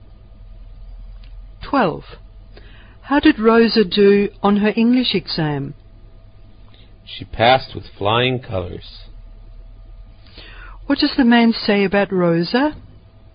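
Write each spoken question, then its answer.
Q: What does the man say about Rosa?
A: She passed her English exam easily and very well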